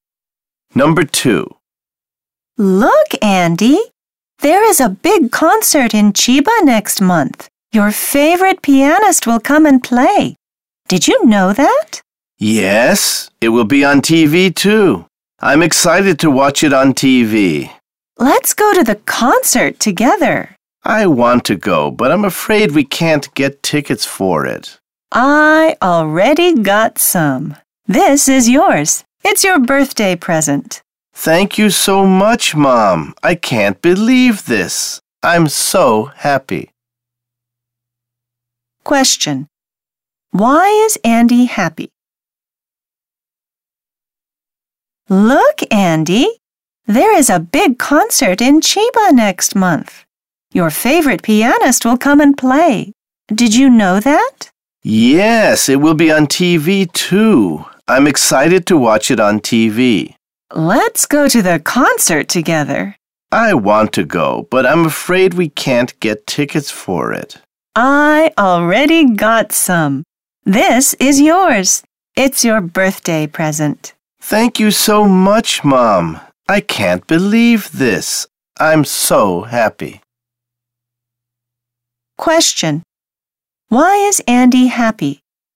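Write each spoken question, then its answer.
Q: Why is Andy happy?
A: His mom gave him a ticket to the concert as a birthday present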